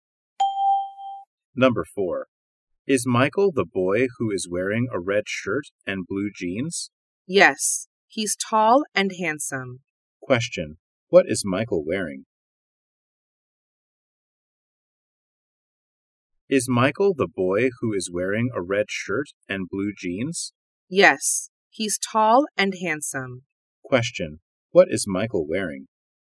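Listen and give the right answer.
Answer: A red shirt and blue jeans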